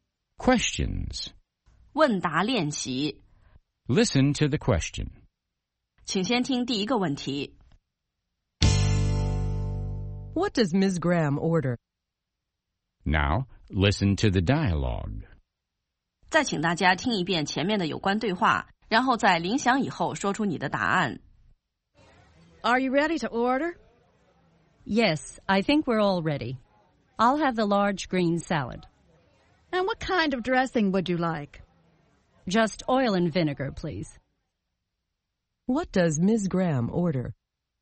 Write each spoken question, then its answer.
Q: What does Ms. Graham order?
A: She orders a large green salad with oil and vinegar dressing.